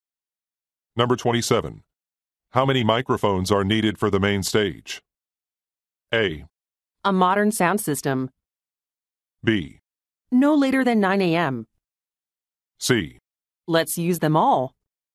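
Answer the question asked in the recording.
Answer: C: Let's use them all.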